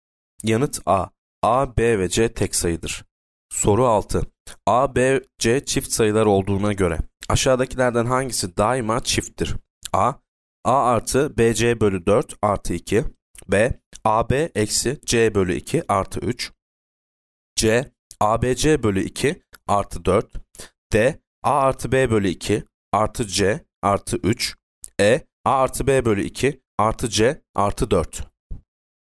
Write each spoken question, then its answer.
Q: A, B, C çift sayılar olduğuna göre aşağıdakilerden hangisi daima çifttir?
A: Yanıt C. ABC bölü 2 artı 4.